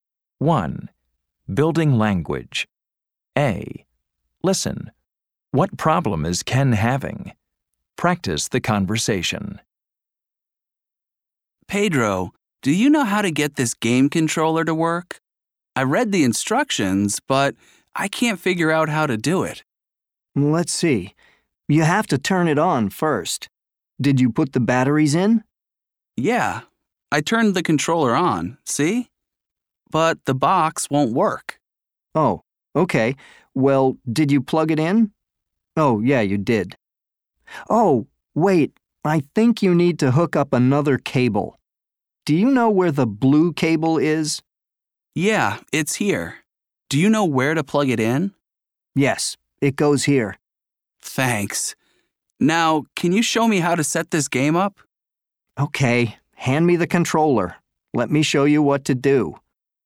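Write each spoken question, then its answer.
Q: What problem is Ken having?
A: He can't get his game controller/game box to work.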